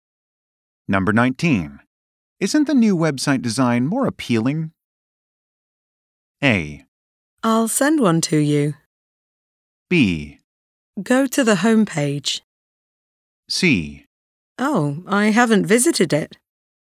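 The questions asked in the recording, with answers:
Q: Isn't the new website design more appealing?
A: C: Oh, I haven't visited it.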